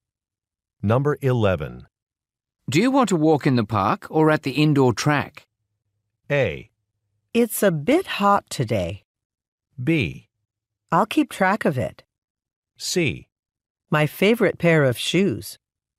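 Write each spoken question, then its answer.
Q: Do you want to walk in the park or at the indoor track?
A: A: It's a bit hot today.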